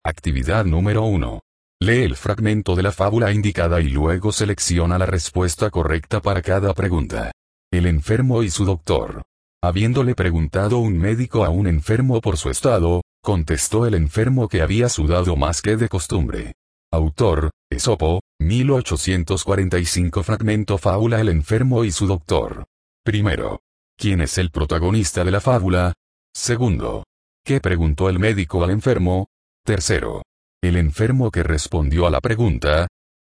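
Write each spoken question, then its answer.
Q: ¿Qué preguntó el médico al enfermo?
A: Por su estado

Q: El enfermo que respondió a la pregunta,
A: Que había sudado más que de costumbre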